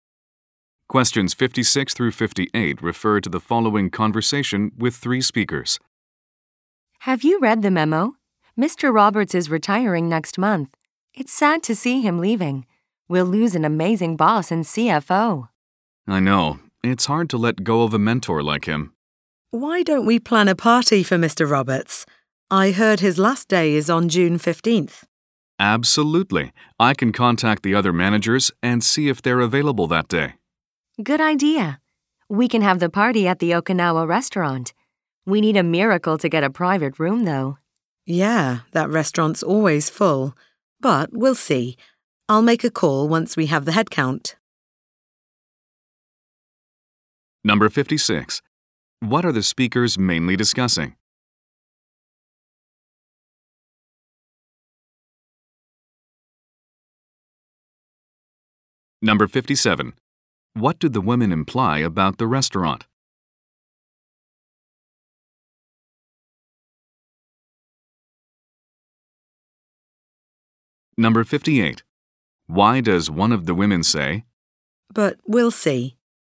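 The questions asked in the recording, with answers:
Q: What are the speakers mainly discussing?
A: A retirement party for Mr. Roberts

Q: What do the women imply about the restaurant?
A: It is always full

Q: Why does one of the women say,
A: She is unsure they can get a private room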